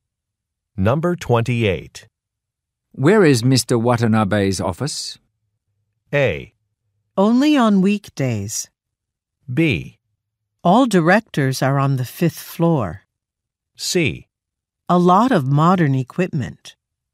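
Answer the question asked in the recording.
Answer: B: All directors are on the fifth floor.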